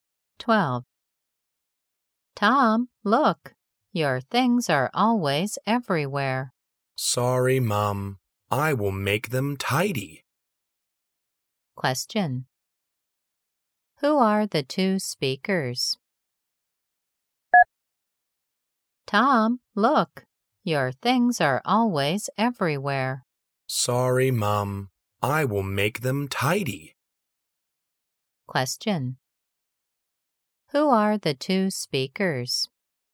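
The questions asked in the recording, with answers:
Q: Who are the two speakers?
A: Tom and his mom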